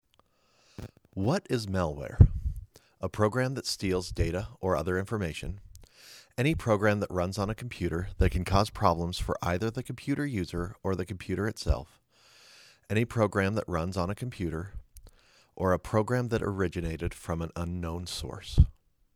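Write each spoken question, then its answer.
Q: What is malware?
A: B: Any program that runs on a computer that can cause problems for either the computer user or the computer itself.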